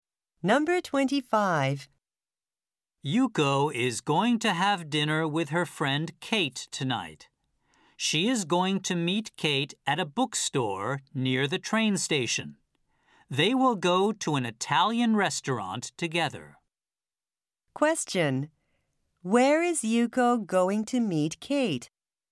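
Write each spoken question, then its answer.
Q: Where is Yuko going to meet Kate?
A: At a bookstore near the train station.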